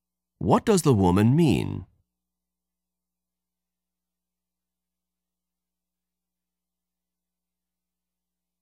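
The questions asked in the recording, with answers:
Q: What does the woman mean?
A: The lecture was boring; she almost fell asleep.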